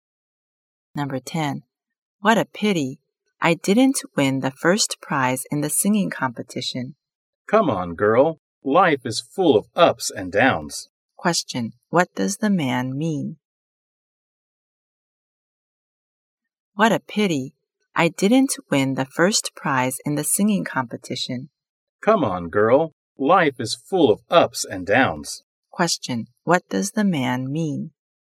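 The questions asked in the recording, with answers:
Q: Question. What does the man mean?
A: Life has ups and downs, so she shouldn't be too sad about losing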